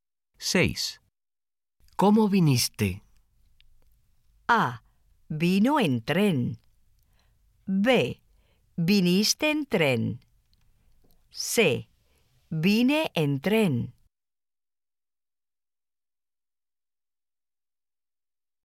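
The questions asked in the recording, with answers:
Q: ¿Cómo viniste?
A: C: Vine en tren.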